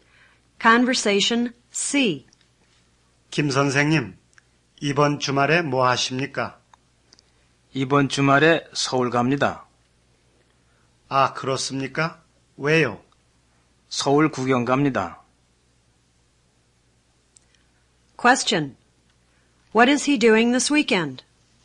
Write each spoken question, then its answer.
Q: What is he doing this weekend?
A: 'He's going sightseeing in Seoul.'